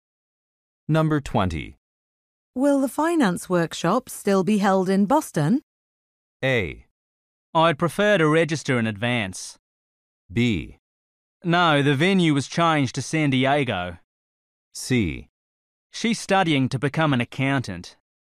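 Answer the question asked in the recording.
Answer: B: No, the venue was changed to San Diego.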